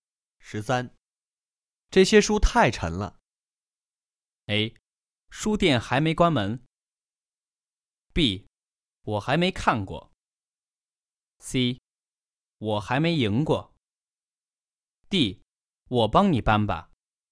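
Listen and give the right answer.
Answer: D: 我帮你搬吧。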